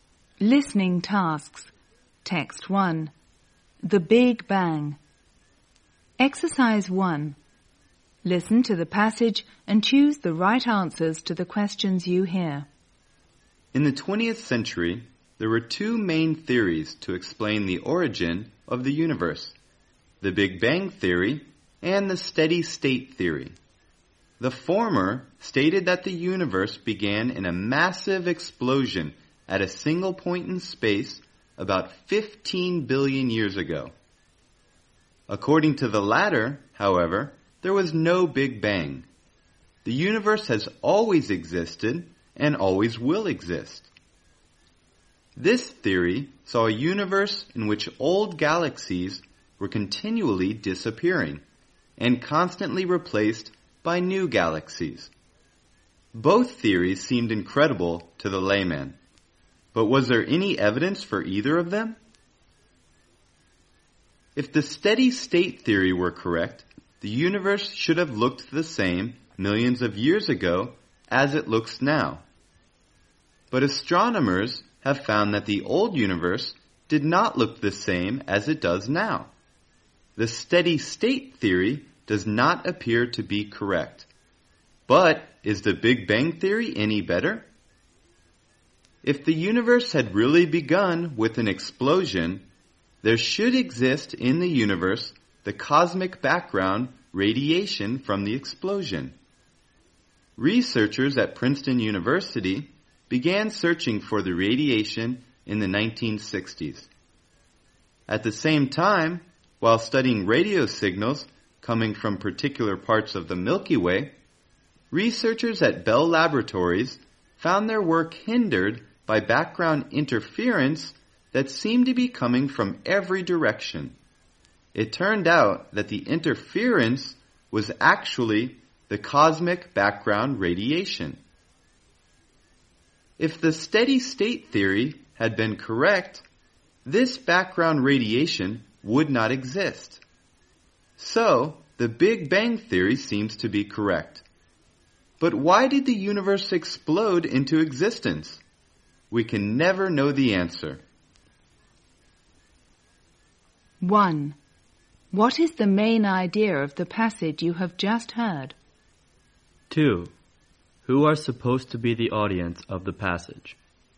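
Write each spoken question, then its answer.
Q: What is the main idea of the passage you have just heard?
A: Evidence suggests the Big Bang theory, not the steady state theory, explains the origin of the universe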